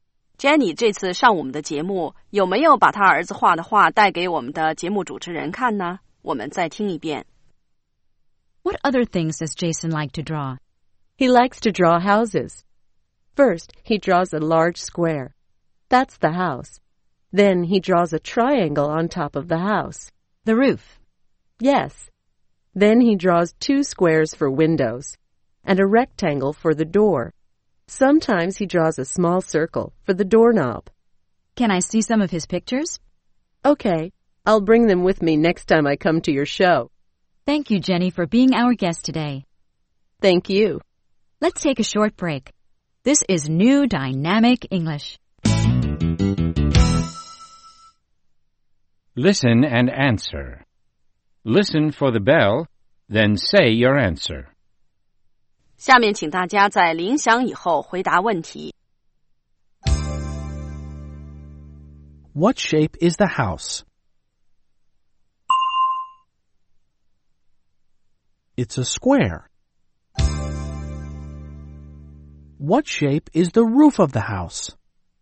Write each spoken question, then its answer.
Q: What shape is the house?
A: It's a square.

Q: What shape is the roof of the house?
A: It's a triangle.